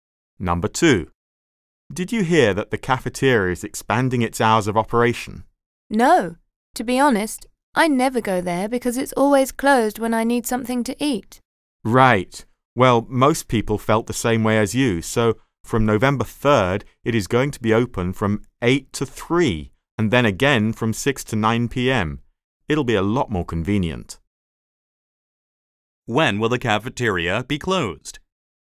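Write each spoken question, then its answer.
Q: When will the cafeteria be closed?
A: From 3 to 6 p.m. (and from 9 p.m. to 8 a.m.)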